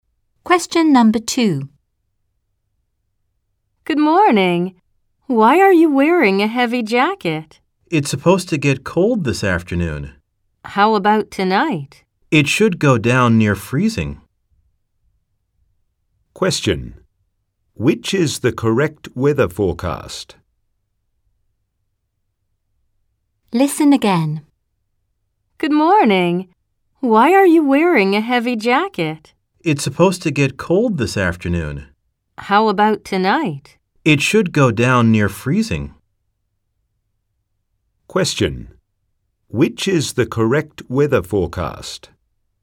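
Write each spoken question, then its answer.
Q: Which is the correct weather forecast?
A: Cold this afternoon, near freezing tonight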